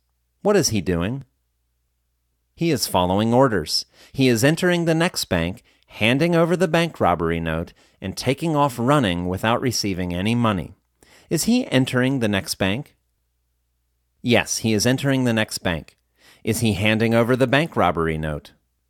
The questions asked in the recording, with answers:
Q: Is he handing over the bank robbery note?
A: Yes, he is handing over the bank robbery note.